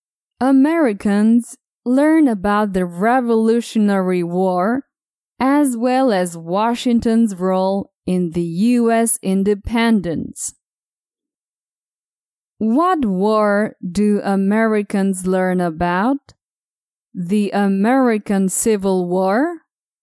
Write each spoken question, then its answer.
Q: What war do Americans learn about?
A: They learn about the Revolutionary War.